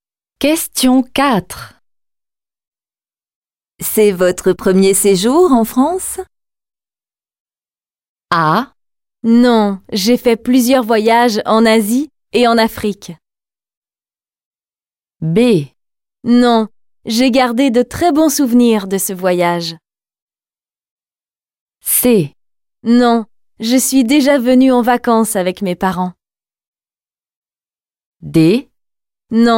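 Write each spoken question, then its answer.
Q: C'est votre premier séjour en France?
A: C: Non, je suis déjà venue en vacances avec mes parents.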